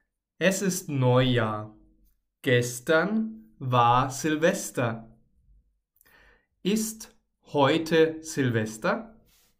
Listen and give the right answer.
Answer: Nein, heute ist nicht Silvester.